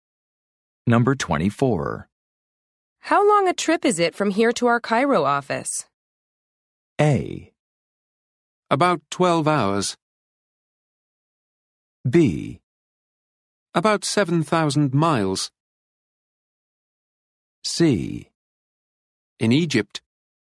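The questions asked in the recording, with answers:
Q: How long a trip is it from here to our Cairo office?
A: A: About 12 hours.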